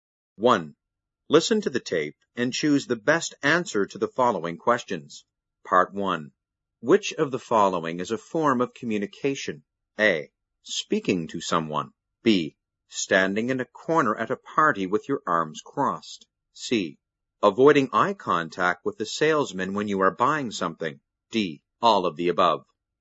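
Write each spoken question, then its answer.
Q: Which of the following is a form of communication?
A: D: All of the above.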